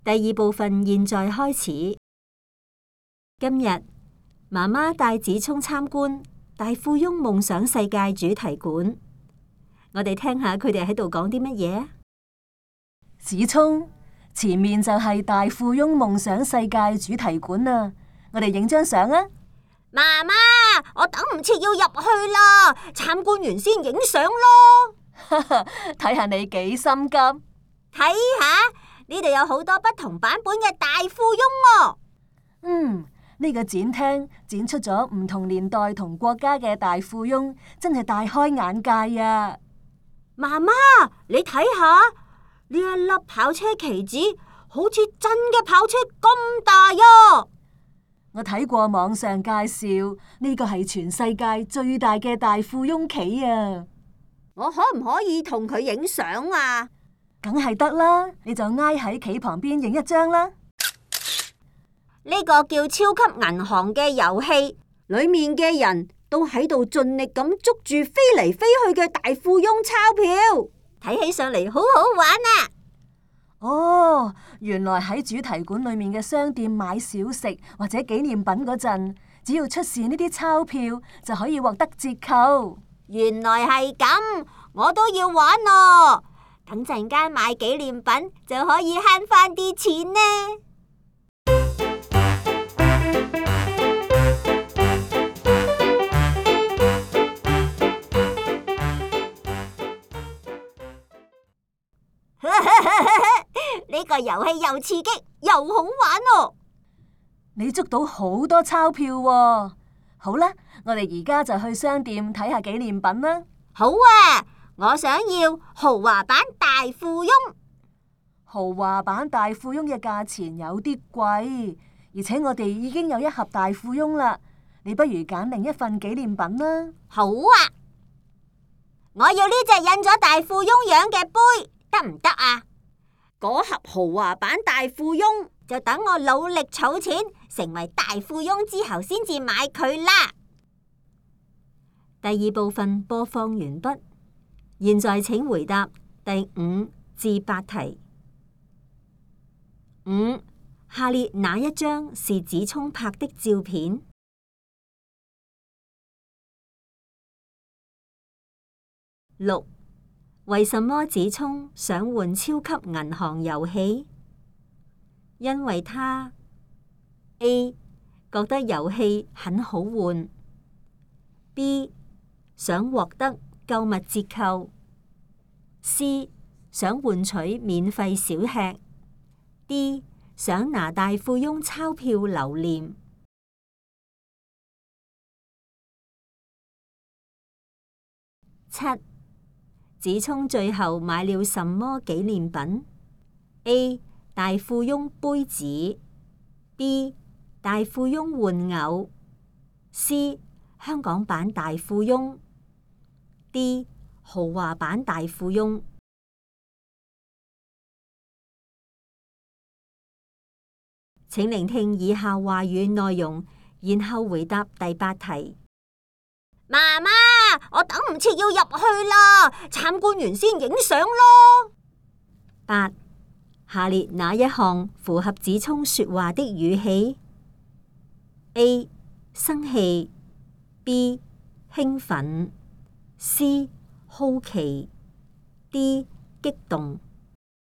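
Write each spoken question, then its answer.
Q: 为什么子聪想玩超级银行游戏?因为他 A 觉得游戏很好玩 ,B 想获得购物折扣。 C 想换取免费小吃。 D 想拿大富翁钞票留念。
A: B: 想获得购物折扣

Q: 子聪最后买了什么纪念品? A 大富翁杯子, B 大富翁玩偶, C 香港版大富翁, D 豪华版大富翁。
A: A: 大富翁杯子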